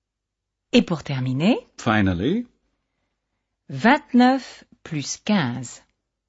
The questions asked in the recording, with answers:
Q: 29 plus 15.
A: Ça fait 44.